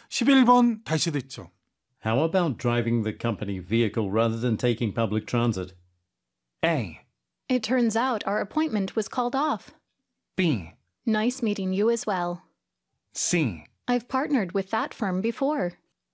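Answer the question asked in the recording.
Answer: A: It turns out our appointment was called off.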